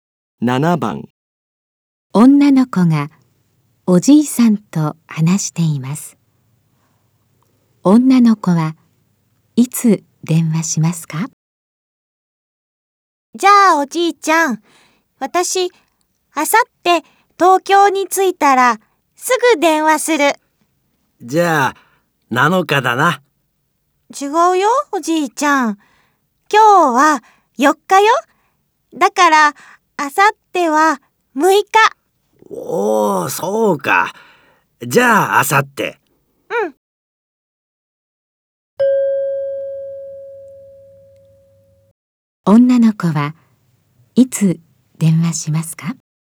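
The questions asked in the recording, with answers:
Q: 女の子はいつ電話しますか?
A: 6日(あさって、東京に着いたらすぐ)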